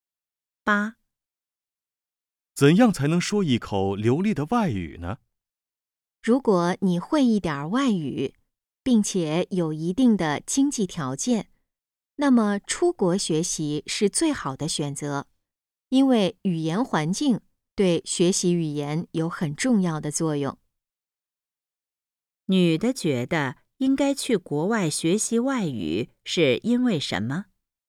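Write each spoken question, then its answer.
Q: 女的觉得应该去国外学习外语是因为什么?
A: 语言环境对学习语言有很重要的作用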